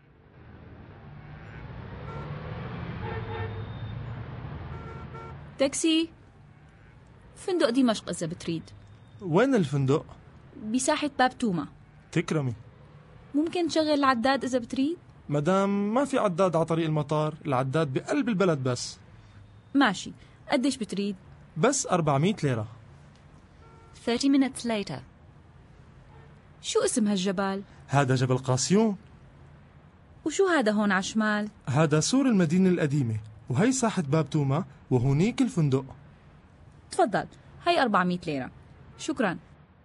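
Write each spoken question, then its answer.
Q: What is the price?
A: 400 lira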